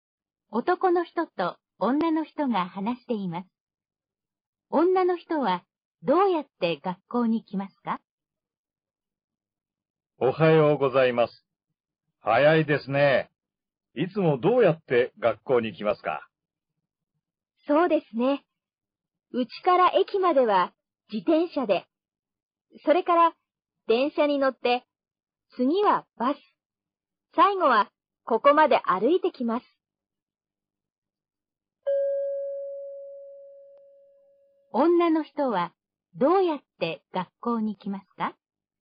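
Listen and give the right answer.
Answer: 自転車で駅まで行き、電車、バスに乗り、最後は歩いて来ます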